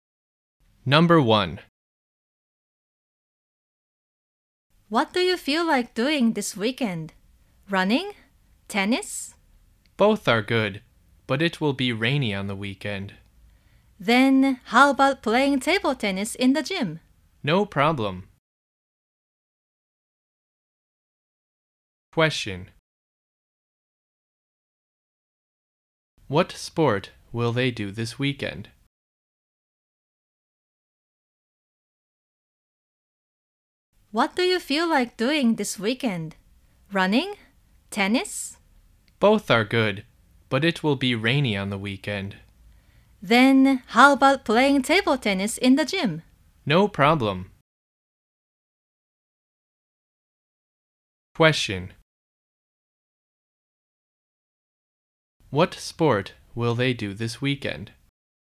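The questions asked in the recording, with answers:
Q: What sport will they do this weekend?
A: Table tennis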